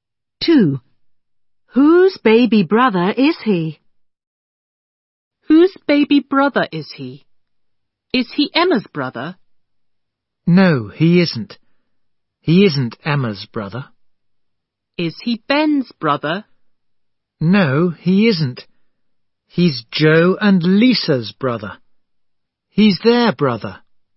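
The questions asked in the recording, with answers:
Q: Whose baby brother is he?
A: Joe and Lisa's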